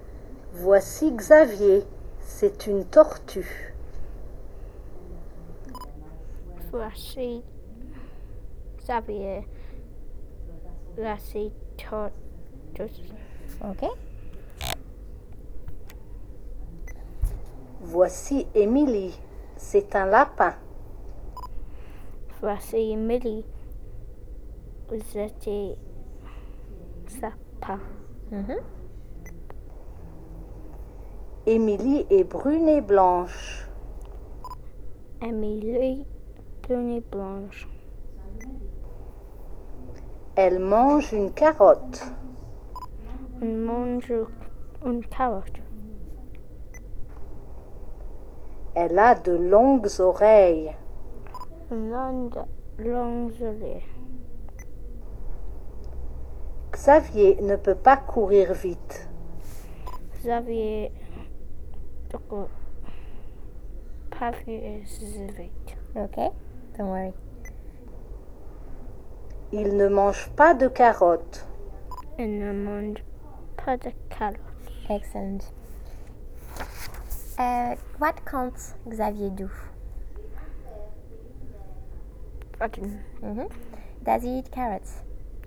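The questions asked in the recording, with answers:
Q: What can't Xavier do?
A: Run fast

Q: Does he eat carrots?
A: No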